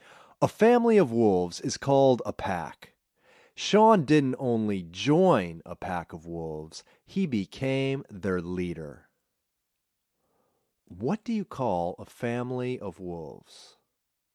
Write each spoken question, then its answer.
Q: What do you call a family of wolves?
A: A family of wolves is called a pack.